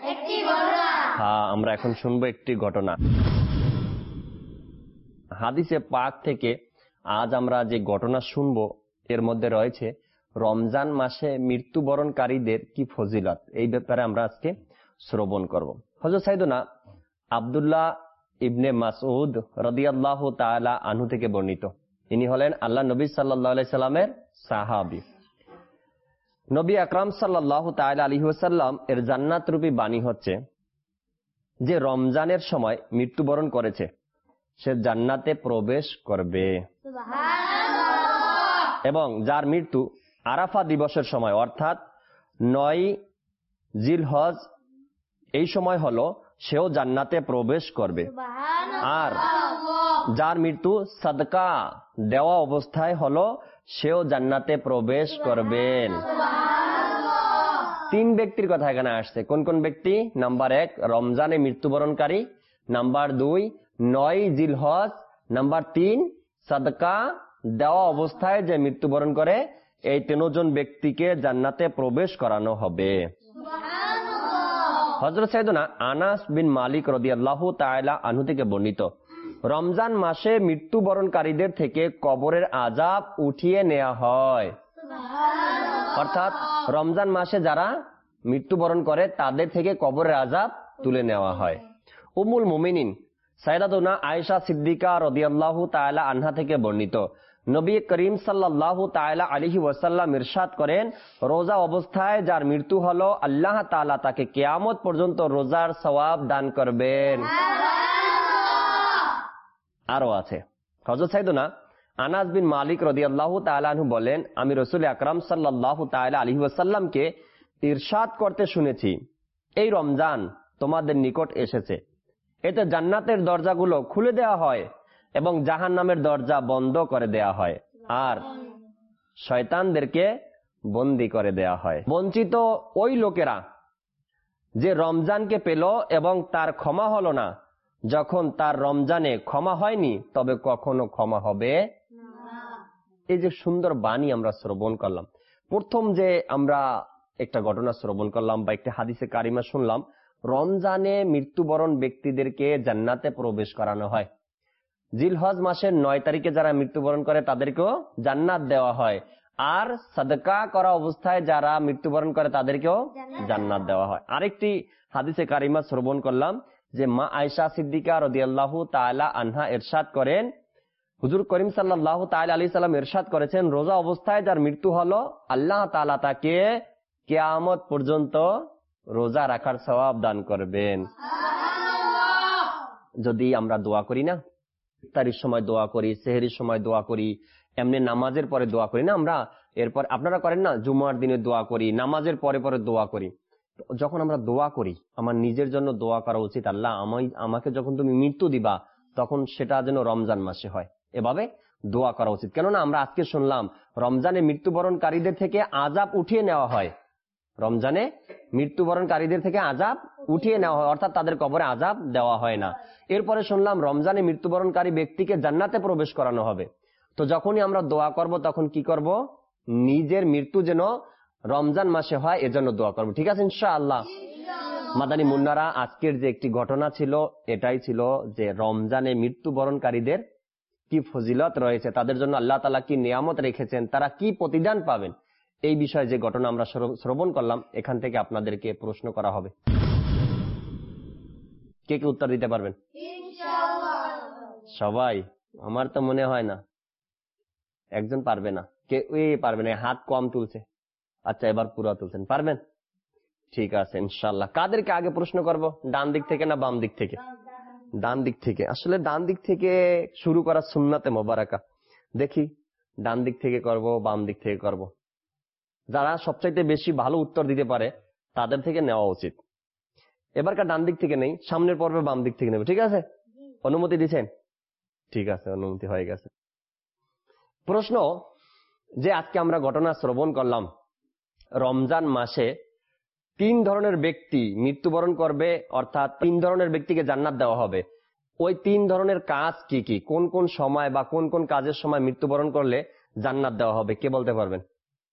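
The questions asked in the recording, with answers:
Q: ওই তিন ধরনের কাজ কি কি, কোন কোন সময় বা কোন কোন কাজের সময় মৃত্যুবরণ করলে জান্নাত দেওয়া হবে, কে বলতে পারবেন?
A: রমজানে মৃত্যু, জিলহজের ৯ তারিখে (আরাফা দিবসে) মৃত্যু, আর সাদকা দেওয়া অবস্থায় মৃত্যু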